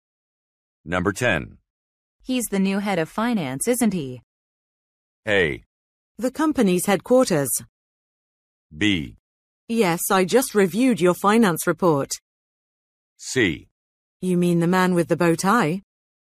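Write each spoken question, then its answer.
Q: He's the new head of finance, isn't he?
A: C: You mean the man with the bow tie?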